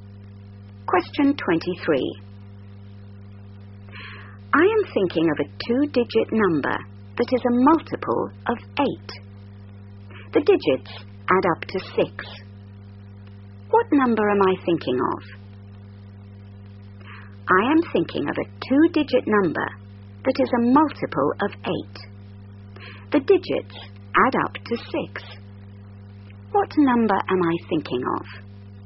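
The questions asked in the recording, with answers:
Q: What number am I thinking of?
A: 24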